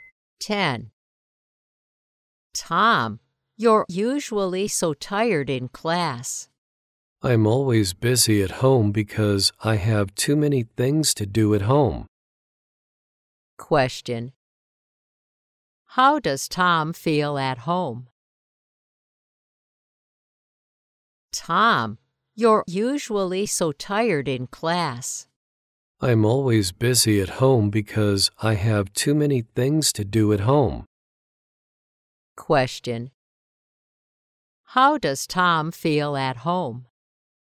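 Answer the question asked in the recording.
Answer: Busy.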